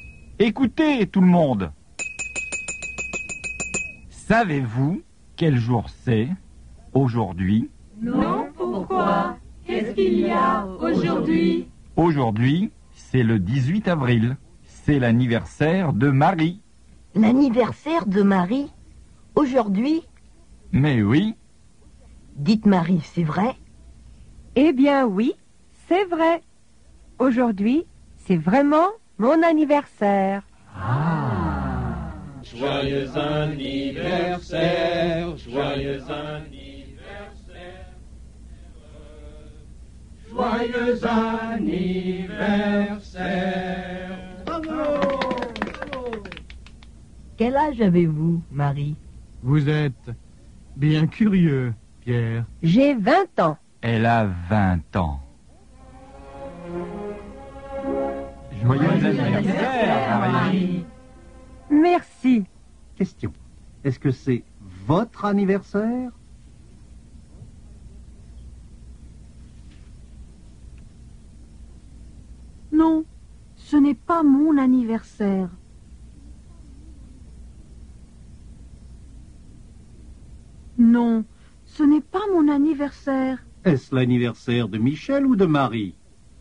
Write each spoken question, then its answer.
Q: Est-ce l'anniversaire de Michel ou de Marie?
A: C'est l'anniversaire de Marie.